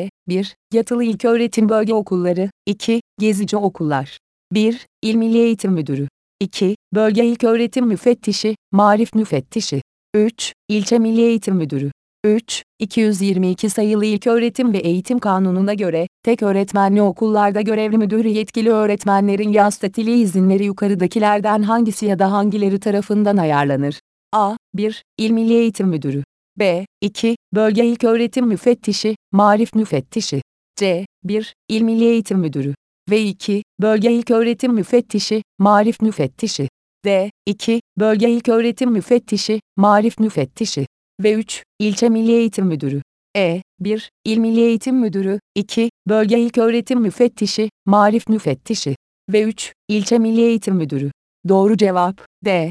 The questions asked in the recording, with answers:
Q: 222 sayılı İlköğretim ve Eğitim Kanunu'na göre, tek öğretmenli okullarda görevli müdürü yetkili öğretmenlerin yaz tatili izinleri yukarıdakilerden hangisi ya da hangileri tarafından ayarlanır?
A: Doğru cevap D.